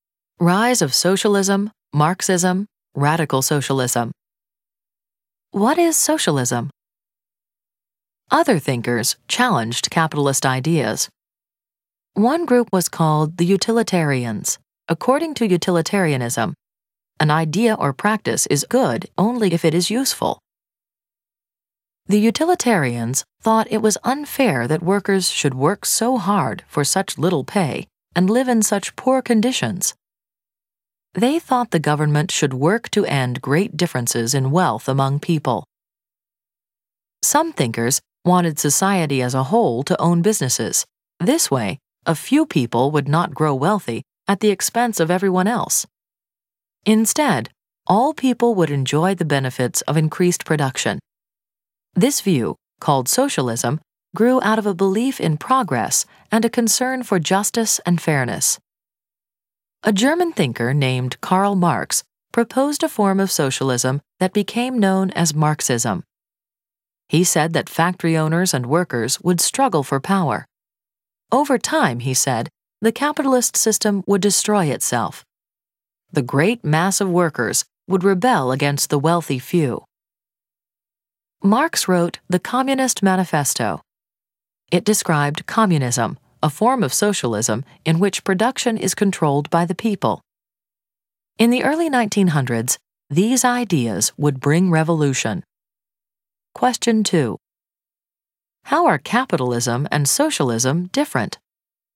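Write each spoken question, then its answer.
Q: How are capitalism and socialism different?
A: Under capitalism, private individuals invest in and own businesses for profit; under socialism, society as a whole owns businesses and shares the benefits.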